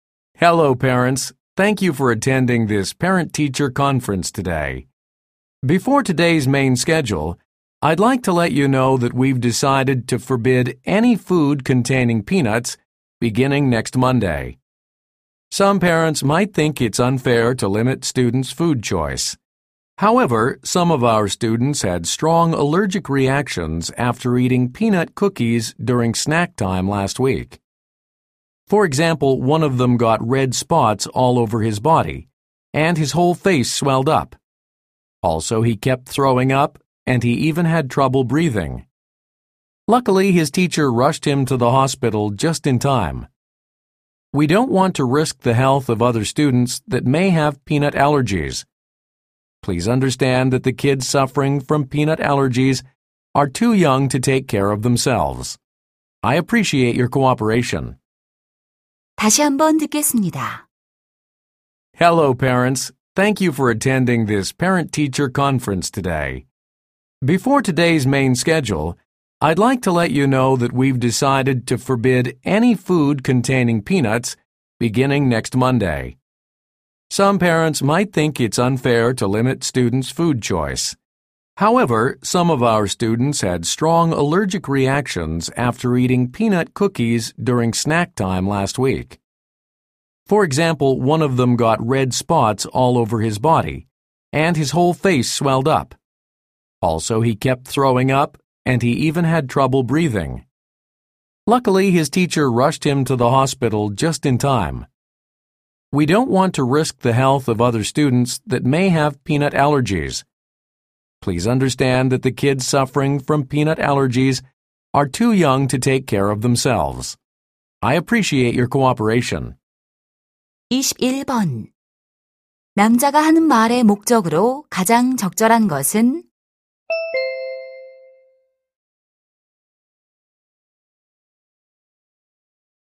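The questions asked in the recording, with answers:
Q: 남자가 하는 말의 목적으로 가장 적절한 것은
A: 땅콩이 든 음식 반입 금지를 알리려고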